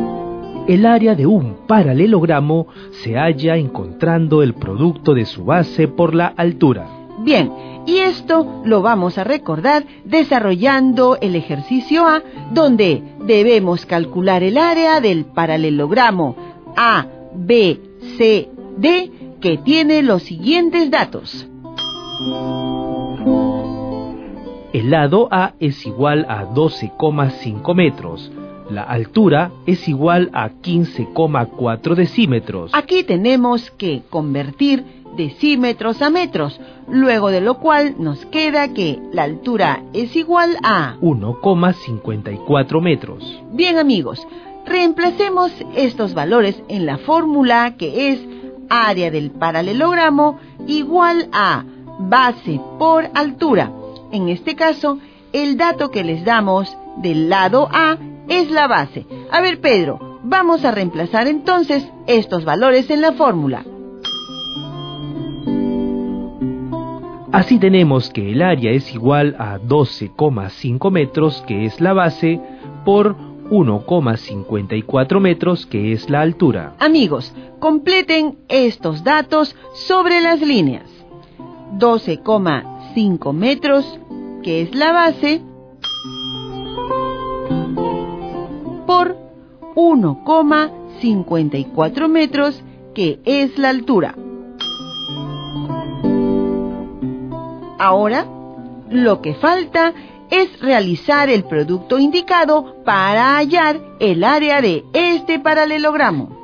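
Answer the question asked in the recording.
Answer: 19,25 m2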